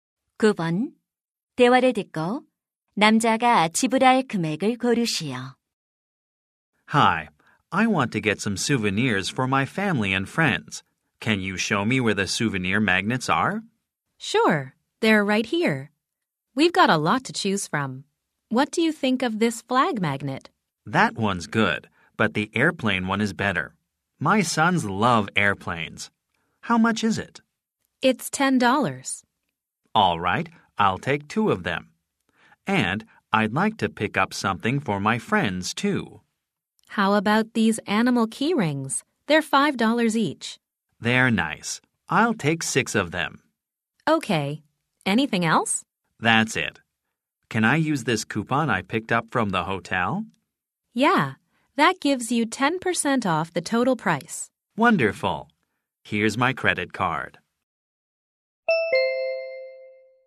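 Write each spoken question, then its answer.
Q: 대화를 듣고 남자가 지불할 금액을 고르시오.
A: $45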